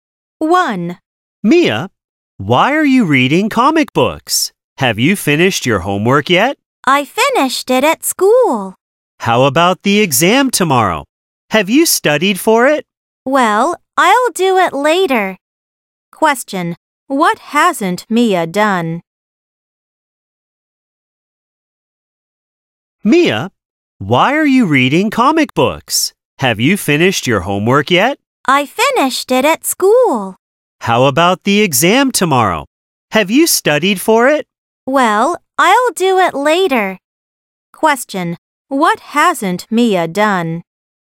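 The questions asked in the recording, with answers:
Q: Question, what hasn't Mia done?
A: She hasn't studied for tomorrow's exam.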